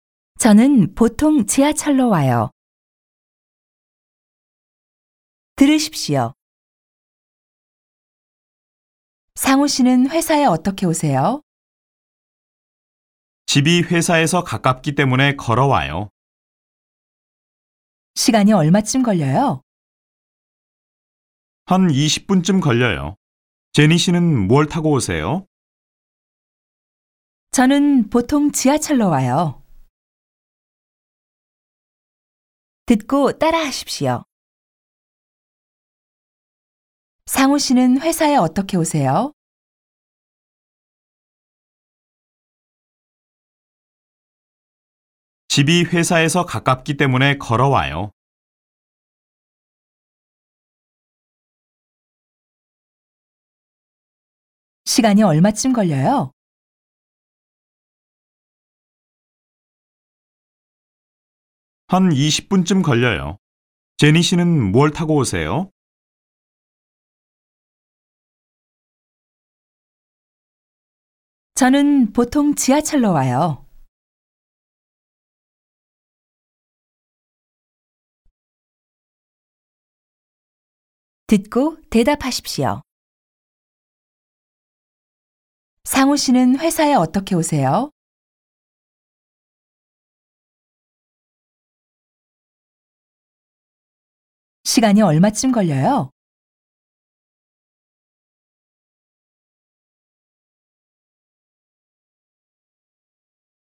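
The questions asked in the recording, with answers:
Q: 상우 씨는 회사에 어떻게 오세요?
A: 집이 회사에서 가깝기 때문에 걸어와요.

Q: 시간이 얼마쯤 걸려요?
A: 한 20분쯤 걸려요.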